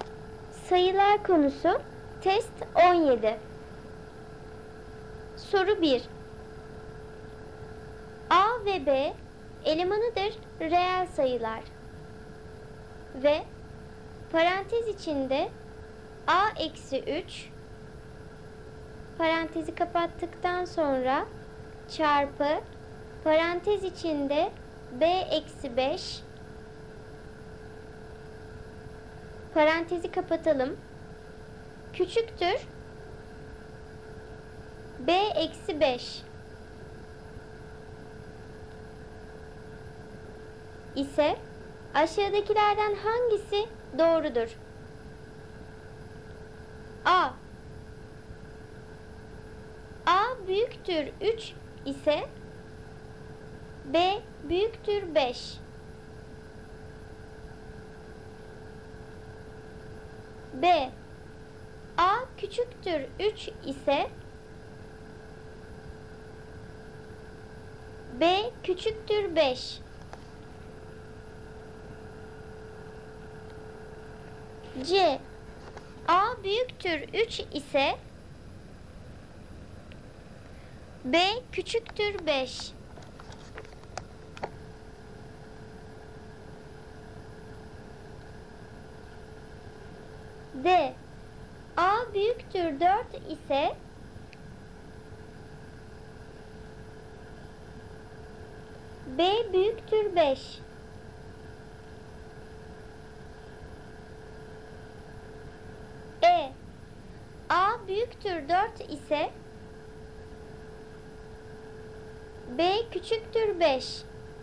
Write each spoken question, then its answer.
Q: İse aşağıdakilerden hangisi doğrudur?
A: Doğru cevap E seçeneği. A 4'ten büyükse B 5'ten küçüktür.